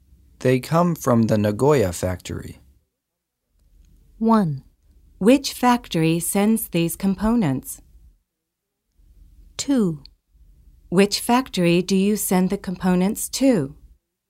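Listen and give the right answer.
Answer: 1: Which factory sends these components?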